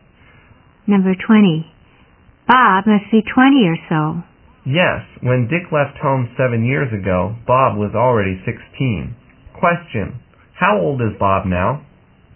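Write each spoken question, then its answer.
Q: Question, how old is Bob now?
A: 23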